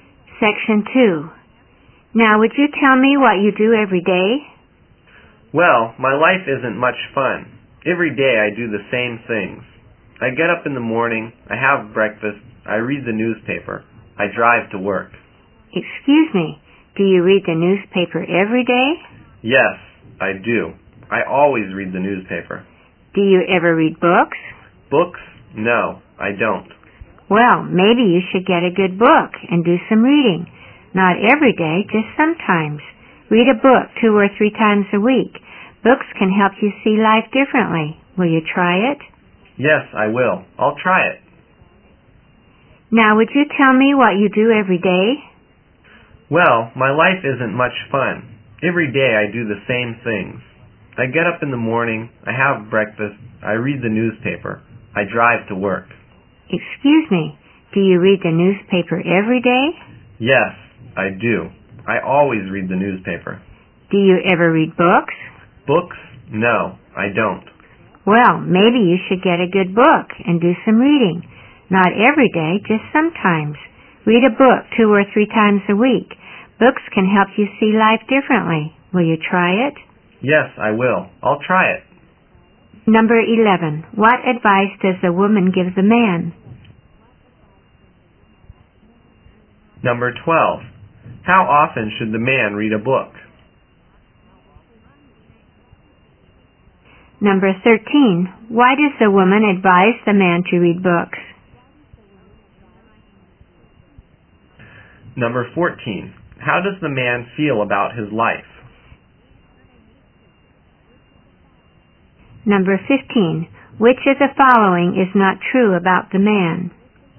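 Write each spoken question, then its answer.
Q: What advice does the woman give the man?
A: To get a good book and do some reading.

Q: How often should the man read a book?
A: 2 or 3 times a week

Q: Why does the woman advise the man to read books?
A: Books can help him see life differently.

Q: How does the man feel about his life?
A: It isn't much fun; he does the same things every day.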